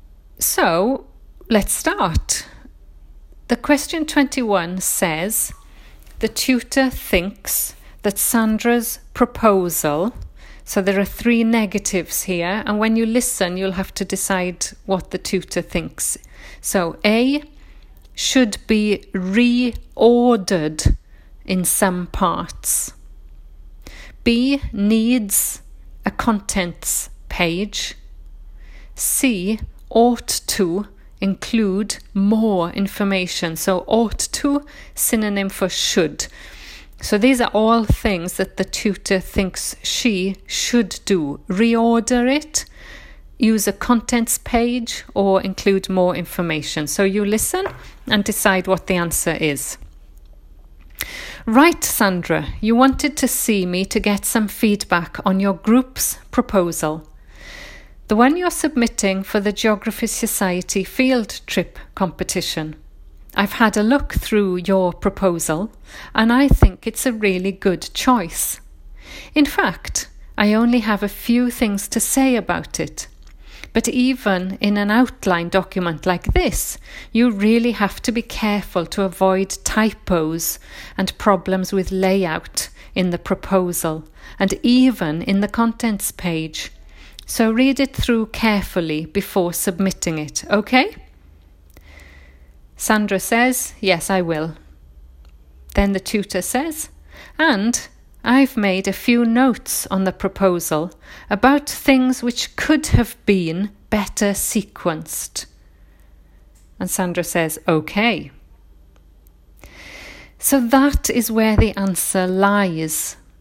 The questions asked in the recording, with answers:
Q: the tutor thinks that Sandra's proposal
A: So the answer for 21 is A.